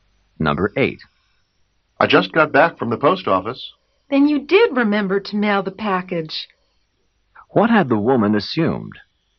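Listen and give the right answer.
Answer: That the man would forget to mail the package.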